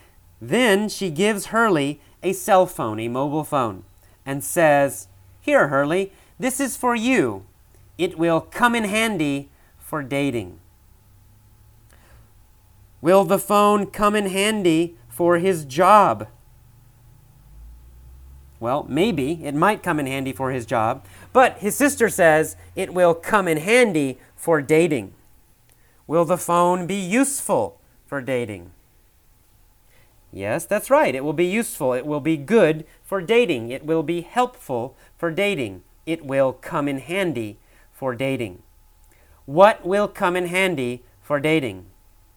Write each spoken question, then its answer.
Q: What will come in handy for dating?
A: Well, the cell phone. The cell phone will come in handy for dating.